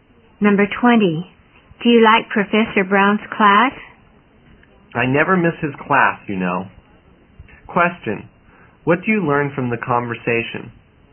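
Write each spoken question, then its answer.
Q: what do you learn from the conversation?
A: The speaker likes Professor Brown's class very much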